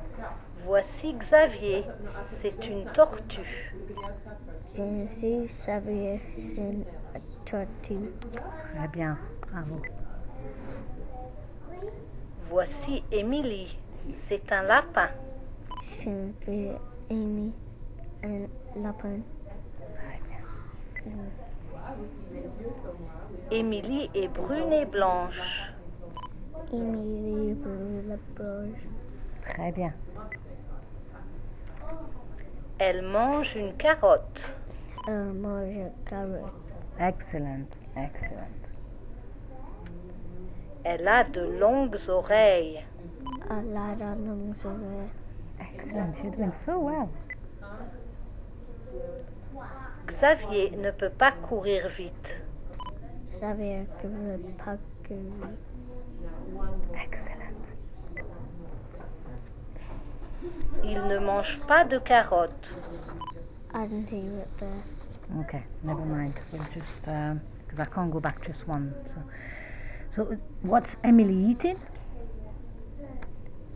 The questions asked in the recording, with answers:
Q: So what's Emily eating?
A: Carrot, yeah.